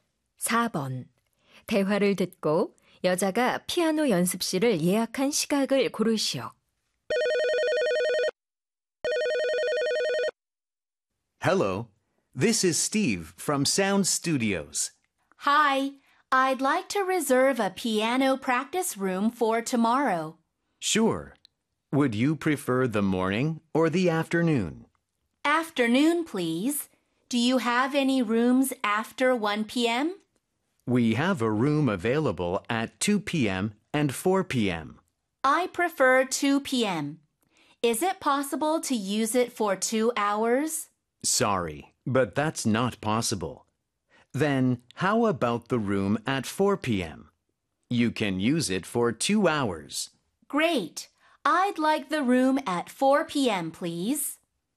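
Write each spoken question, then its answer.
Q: 대화를 듣고 여자가 피아노 연습실을 예약한 시각을 고르시오.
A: 오후 4시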